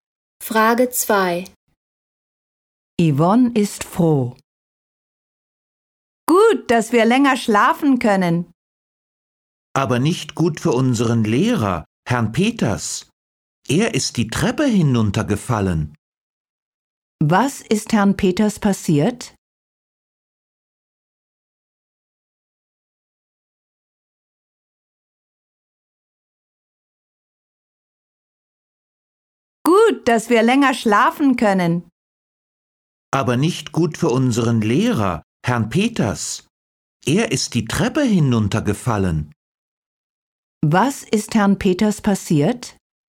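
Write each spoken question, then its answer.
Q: Was ist Herrn Peters passiert?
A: Er ist die Treppe hinuntergefallen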